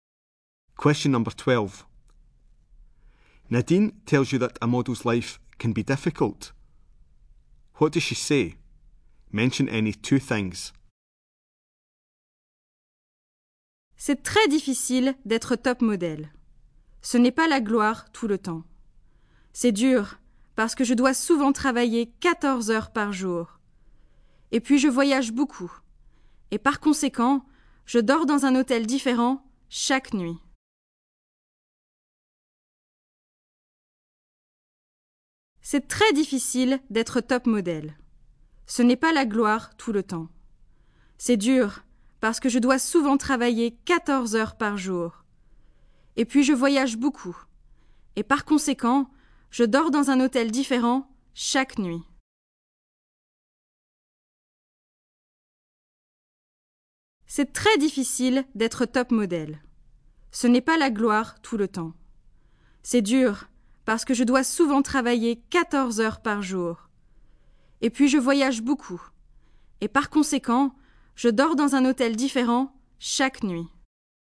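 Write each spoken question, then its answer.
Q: What does she say? Mention any two things.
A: Often works 14 hours a day; travels a lot; sleeps in a different hotel every night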